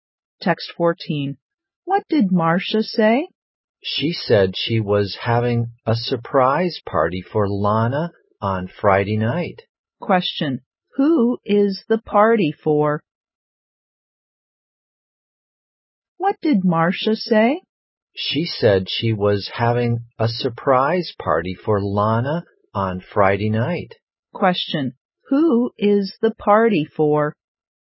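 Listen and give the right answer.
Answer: Lana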